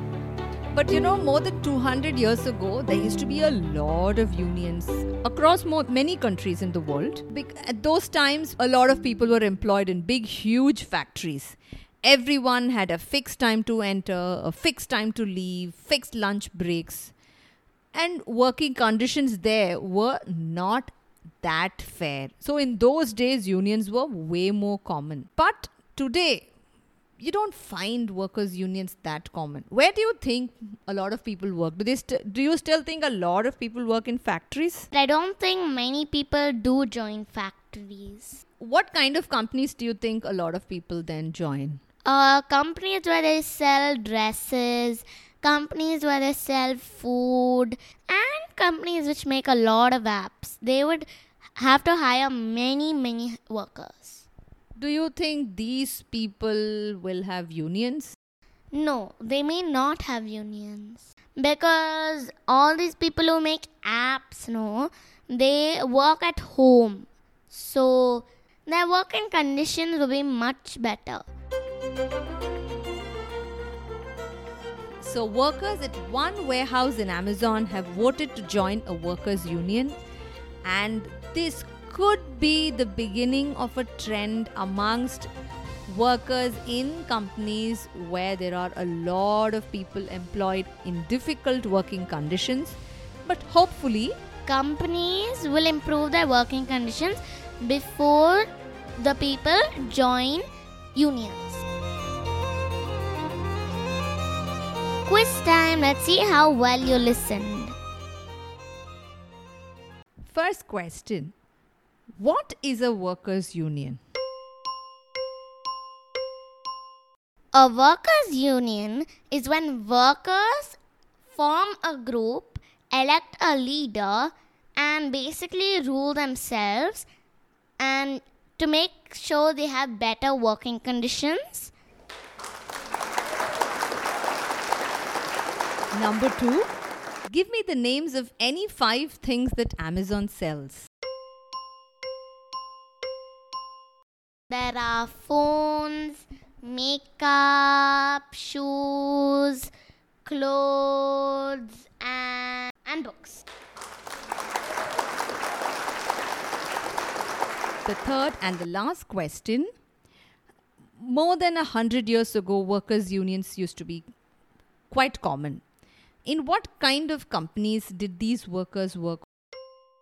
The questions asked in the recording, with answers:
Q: More than 100 years ago, workers' unions used to be quite common. In what kind of companies did these workers work?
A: Companies that had large factories.